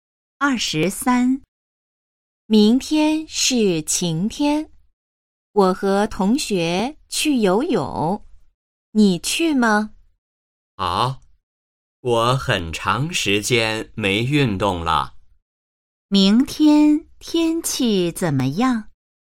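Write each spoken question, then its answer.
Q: 明天天气怎么样?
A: 晴天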